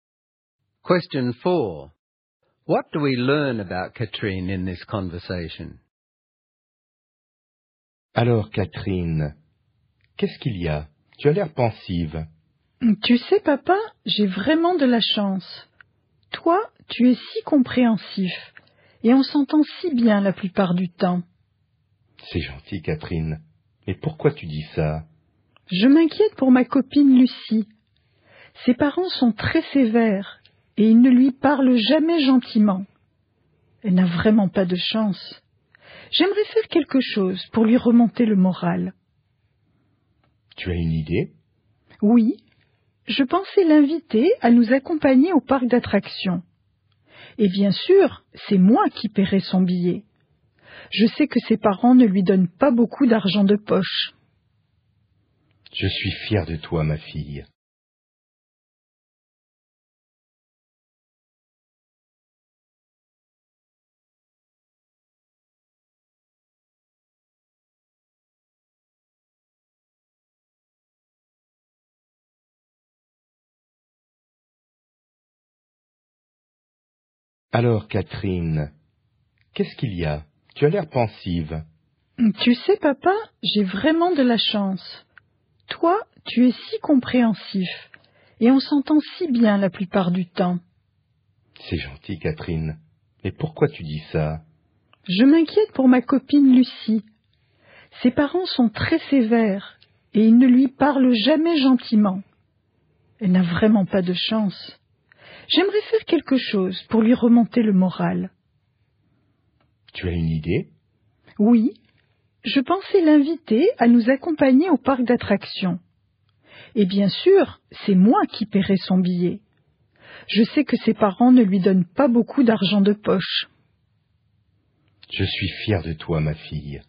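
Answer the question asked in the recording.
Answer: She gets on well with her father, cares about her friend Lucie and wants to cheer her up by taking her to the amusement park and paying for her ticket; she is kind and generous.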